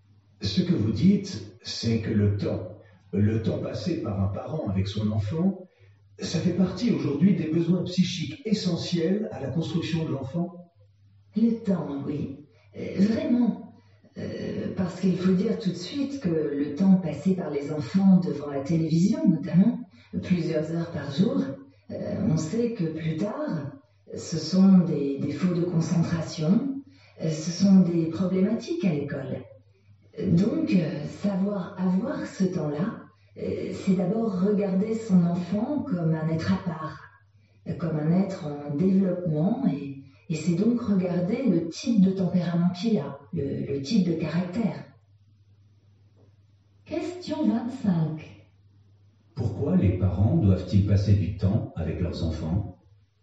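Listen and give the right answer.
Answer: Parce que c'est un besoin psychique essentiel à la construction de l'enfant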